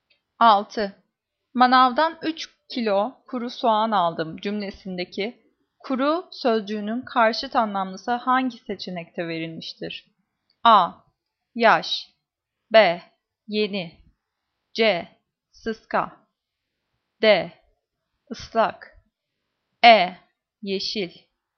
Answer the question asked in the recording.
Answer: Cevap E. Yeşil.